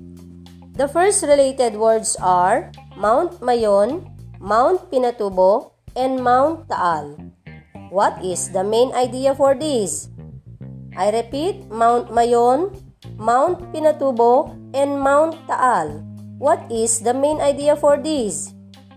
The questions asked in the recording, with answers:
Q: What is the main idea for these?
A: Yes, the main idea is volcanoes.